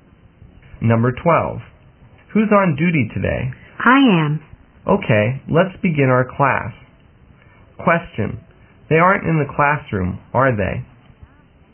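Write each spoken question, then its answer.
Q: They aren't in the classroom, are they?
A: Yes, they are.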